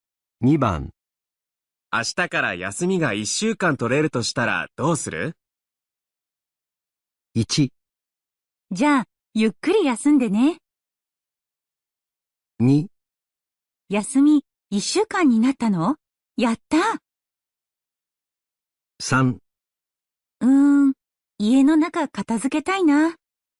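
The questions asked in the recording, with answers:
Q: 明日から休みが1週間取れるとしたらどうする?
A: 3: 家の中片付けたいな。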